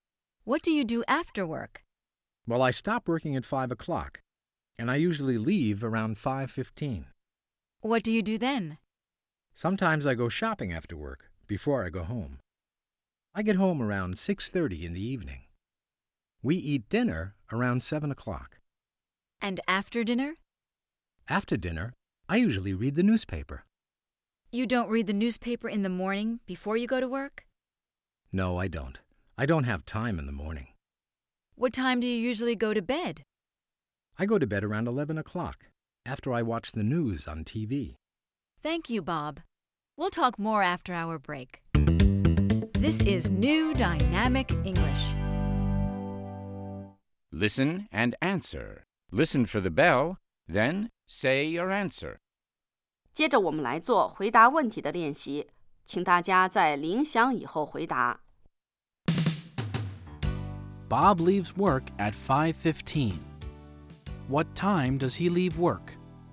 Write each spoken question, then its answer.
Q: What time does he leave work?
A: He leaves work at 5:15.